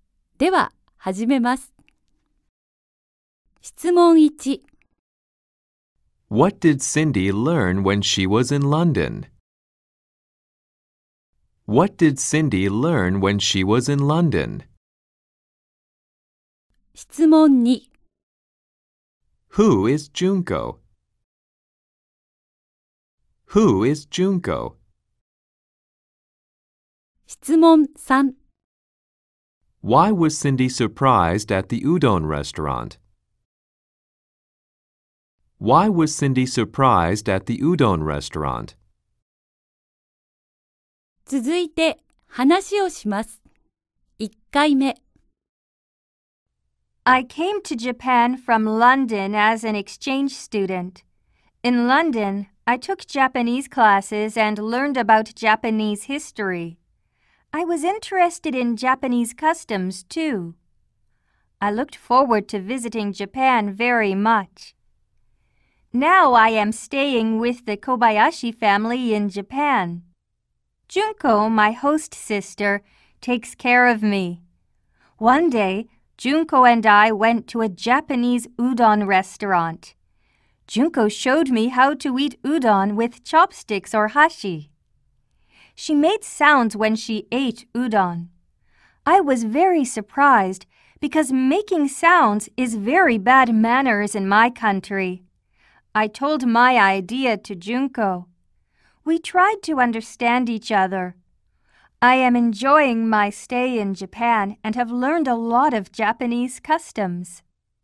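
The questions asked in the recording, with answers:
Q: What did Cindy learn when she was in London?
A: She learned Japanese and about Japanese history.

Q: Who is Junko?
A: Cindy's host sister

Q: Why was Cindy surprised at the udon restaurant?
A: Because Junko made sounds while eating udon, which is very bad manners in Cindy's country.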